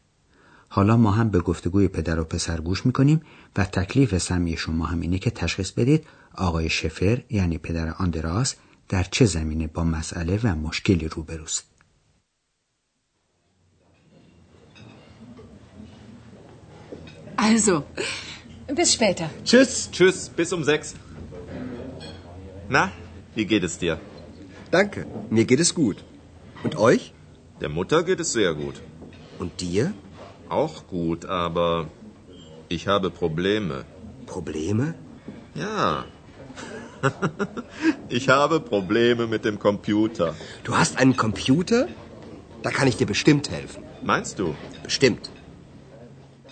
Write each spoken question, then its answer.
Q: تکلیف سمی شما هم اینه که تشخیص بدید آقای شفر یعنی پدر آندراس در چه زمینه با مسئله و مشکلی روبروست.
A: بله، آقای شفر در رابطه با کامپیوتر خودش مشکلاتی داره.